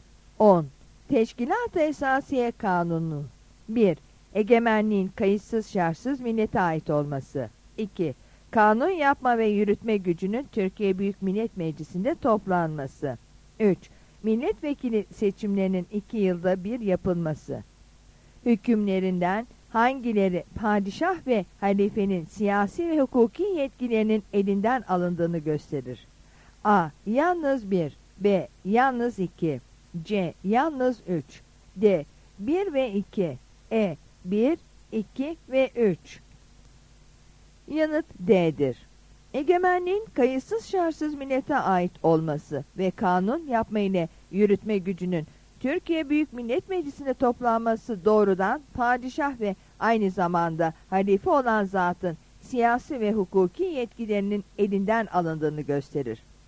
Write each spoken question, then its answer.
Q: Hükümlerinden hangileri padişah ve halifenin siyasi ve hukuki yetkilerinin elinden alındığını gösterir.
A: Yanıt D'dir.